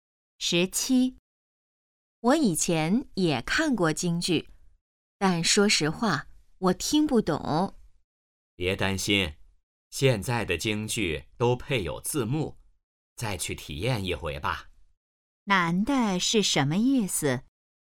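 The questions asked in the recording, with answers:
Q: 男的是什么意思?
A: 建议再去看一次京剧,现在有字幕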